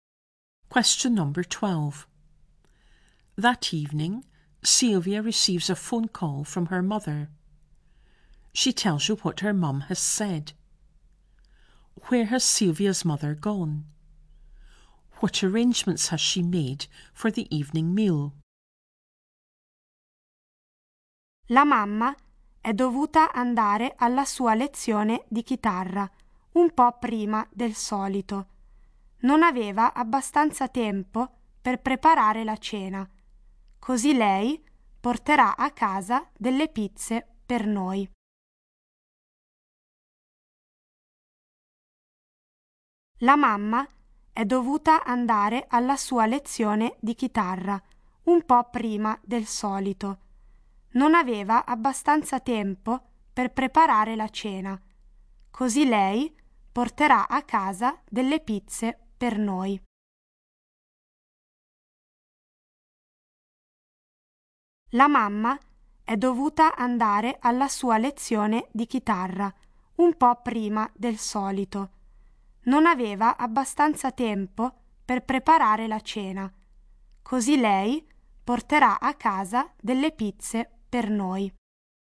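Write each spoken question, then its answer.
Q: Where has Sylvia's mother gone?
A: To her guitar lesson, earlier than usual

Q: What arrangements has she made for the evening meal?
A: She will bring pizzas home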